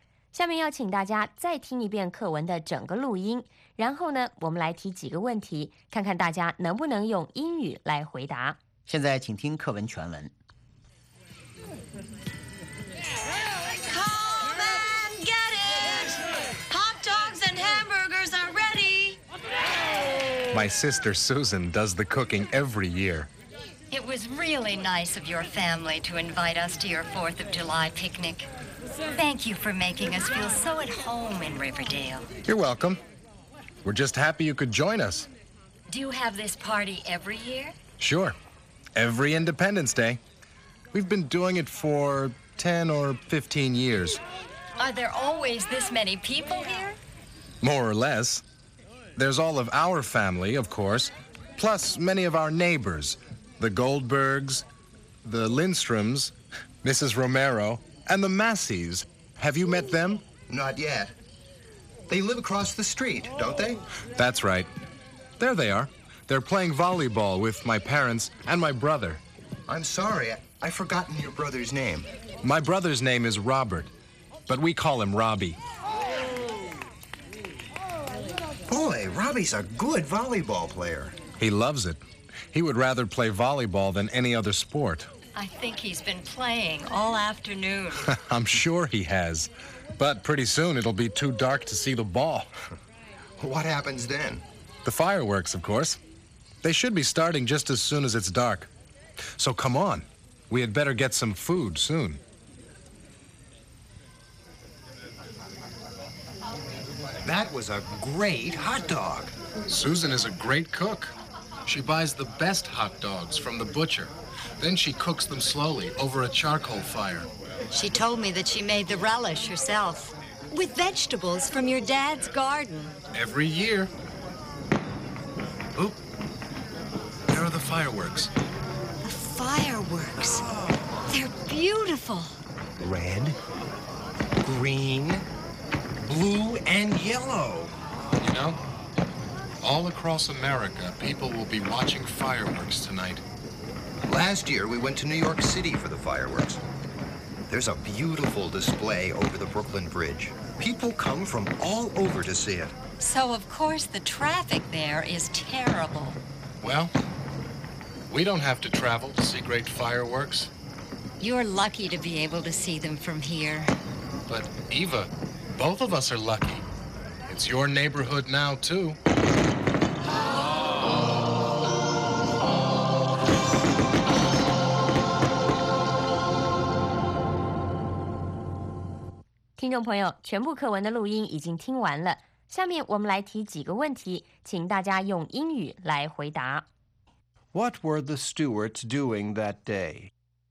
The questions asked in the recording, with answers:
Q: What were the Stewarts doing that day?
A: They were having a 4th of July picnic.